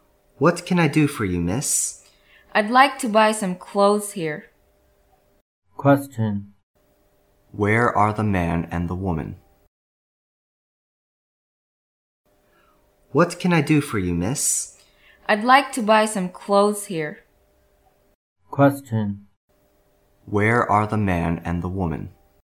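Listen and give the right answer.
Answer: In a clothes shop.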